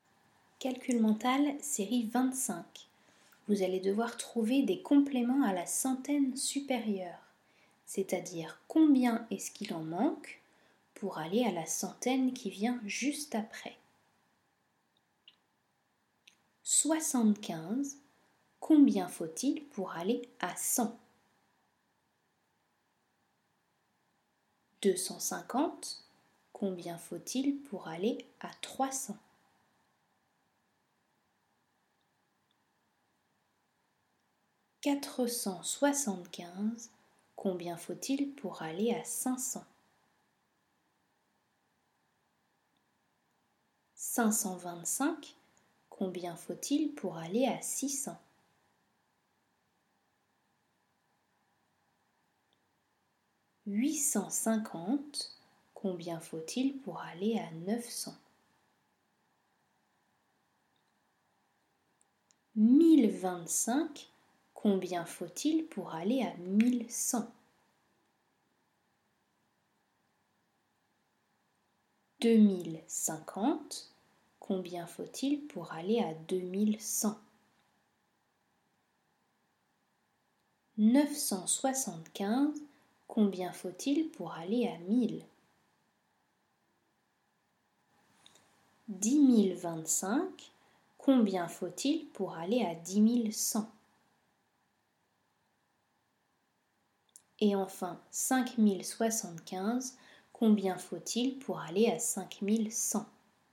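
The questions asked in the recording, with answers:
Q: 75. Combien faut-il pour aller à 100?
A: 25

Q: 250. Combien faut-il pour aller à 300?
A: 50

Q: 475. Combien faut-il pour aller à 500?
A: 25

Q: 525. Combien faut-il pour aller à 600?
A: 75

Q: 850. Combien faut-il pour aller à 900?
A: 50

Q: 1025. Combien faut-il pour aller à 1100?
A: 75

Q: 2050. Combien faut-il pour aller à 2100?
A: 50

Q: 975. Combien faut-il pour aller à 1000?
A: 25

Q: 10025. Combien faut-il pour aller à 10100?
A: 75

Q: Et enfin, 5075, combien faut-il pour aller à 5100?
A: 25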